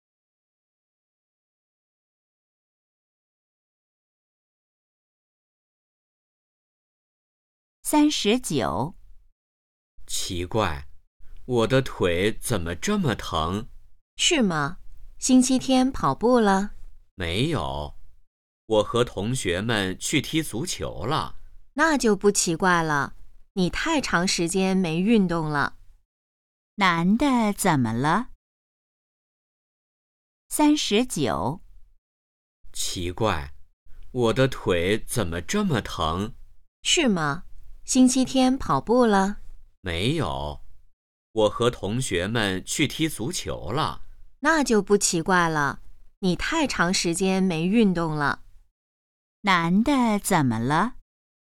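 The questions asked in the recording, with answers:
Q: 男的怎么了?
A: 腿疼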